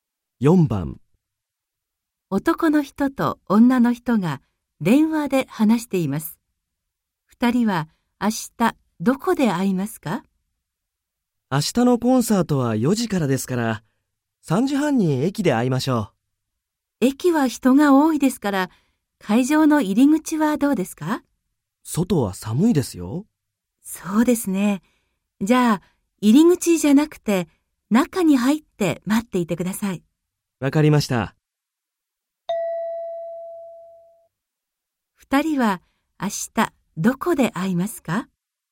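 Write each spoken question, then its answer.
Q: 2人は明日どこで会いますか?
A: 会場の中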